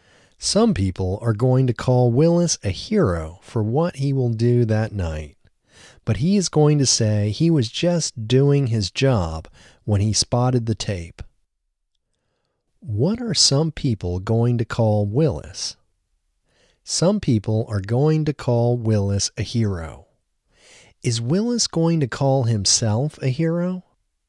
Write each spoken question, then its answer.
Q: What are some people going to call Willis?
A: Some people are going to call Willis a hero.

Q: Is Willis going to call himself a hero?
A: No, Willis isn't going to call himself a hero.